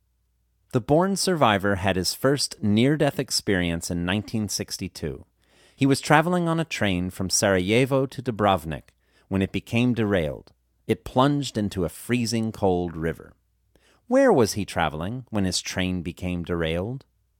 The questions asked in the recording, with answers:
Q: Where was he traveling when his train became derailed?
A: He was traveling from Sarajevo to Dubrovnik when his train became derailed.